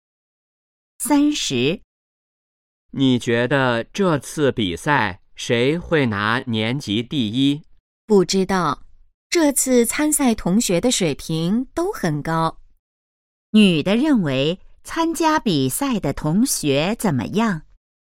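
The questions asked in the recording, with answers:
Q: 女的认为参加比赛的同学怎么样?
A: 水平都很高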